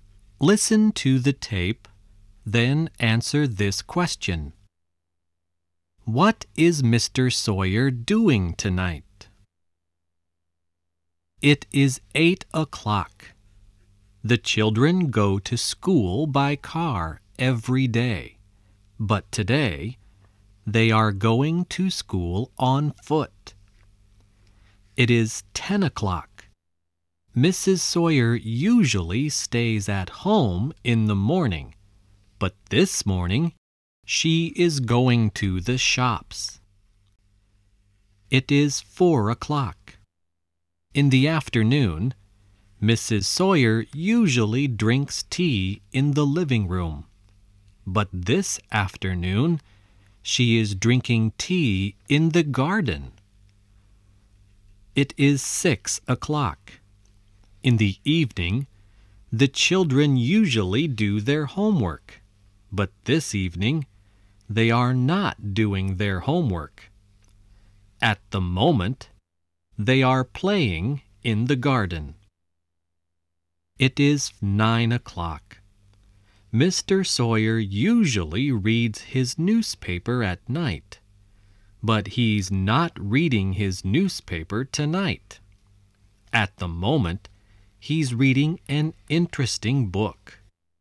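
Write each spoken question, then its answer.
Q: What is Mr. Sawyer doing tonight?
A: He's reading an interesting book.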